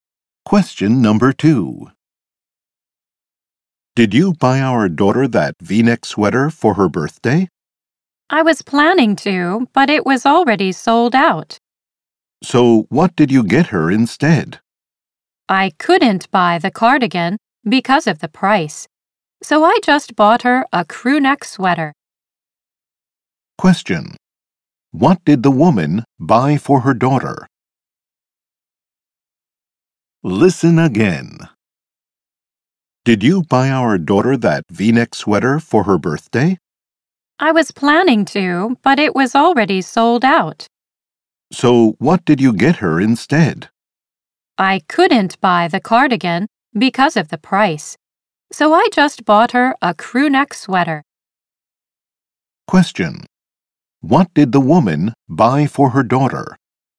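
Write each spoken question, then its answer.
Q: What did the woman buy for her daughter?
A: A crew neck sweater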